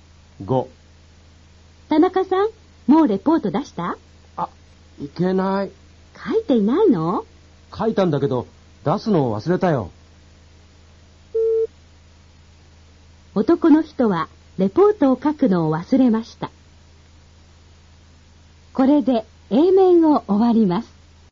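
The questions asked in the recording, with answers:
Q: 男の人はレポートを書くのを忘れました。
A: 正しくない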